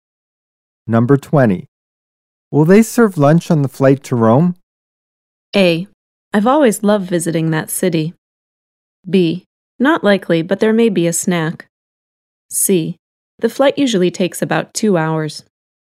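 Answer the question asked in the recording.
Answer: B: Not likely, but there may be a snack.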